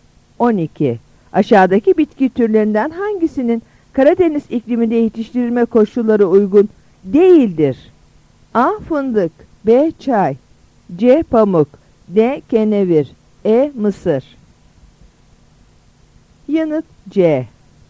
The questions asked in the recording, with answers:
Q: Aşağıdaki bitki türlerinden hangisinin Karadeniz ikliminde yetiştirilme koşulları uygun değildir?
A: Yanıt C.